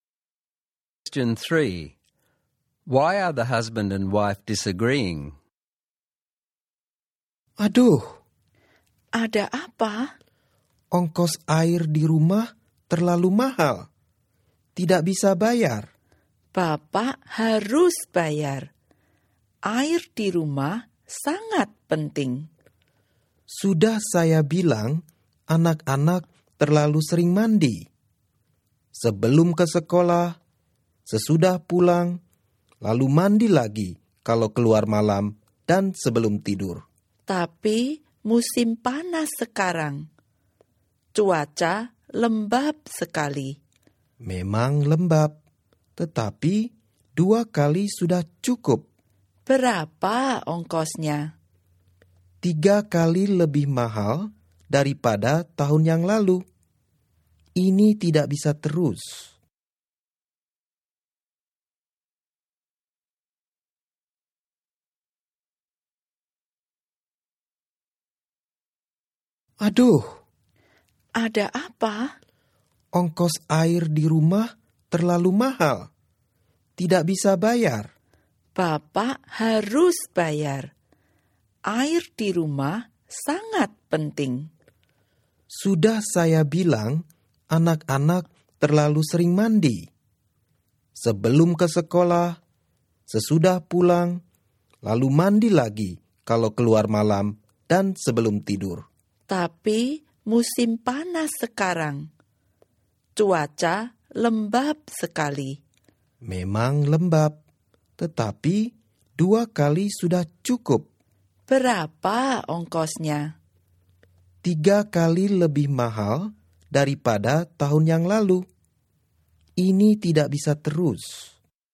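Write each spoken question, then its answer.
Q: Why are the husband and wife disagreeing?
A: The water bill is too high (three times last year's); he says the children bathe too often, she says it is hot and humid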